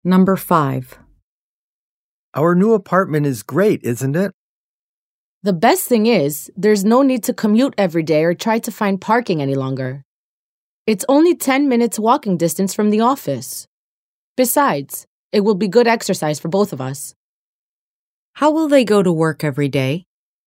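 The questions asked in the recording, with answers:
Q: How will they go to work every day?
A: They will walk.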